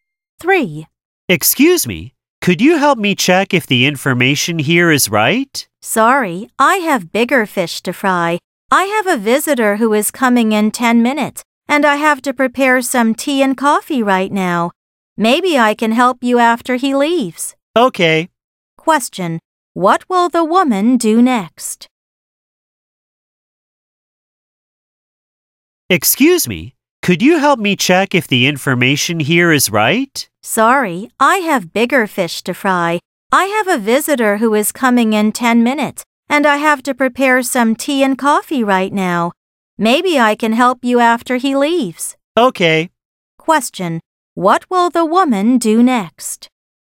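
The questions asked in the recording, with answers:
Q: What will the woman do next?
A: Prepare tea and coffee for a visitor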